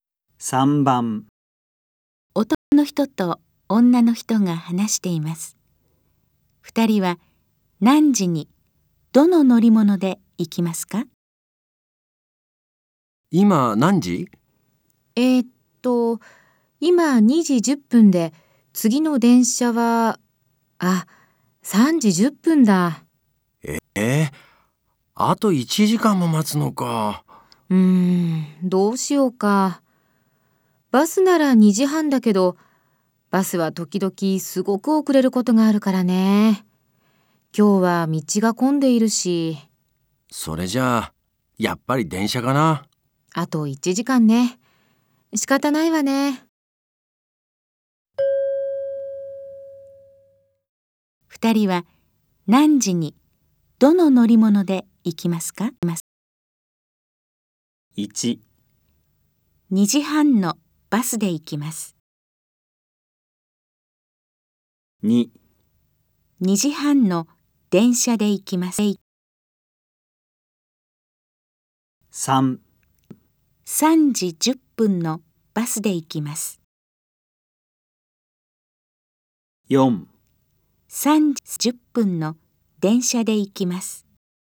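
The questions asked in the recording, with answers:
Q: 二人は何時にどの乗り物で行きますか?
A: 4: 3時10分の電車で行きます。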